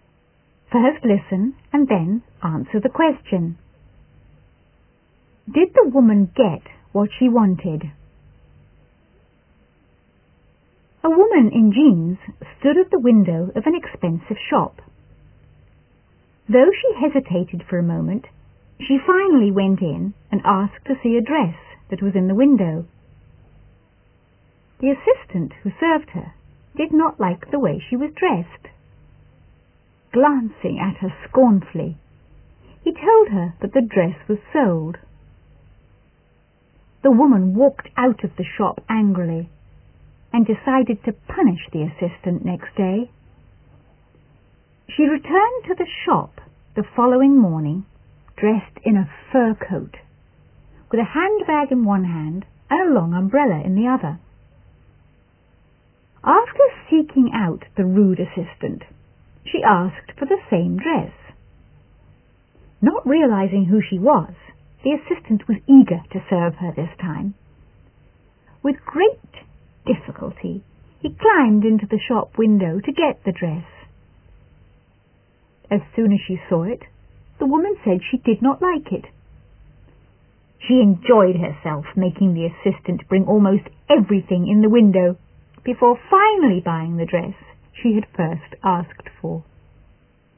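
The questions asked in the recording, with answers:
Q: Did the woman get what she wanted?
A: Yes, she finally bought the dress she had first asked for.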